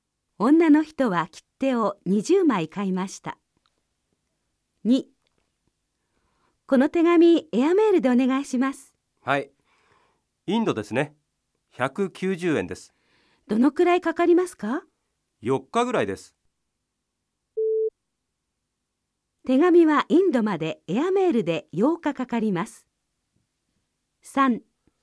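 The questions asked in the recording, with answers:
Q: 手紙はインドまでエアメールで8日かかります。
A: ×(4日ぐらい)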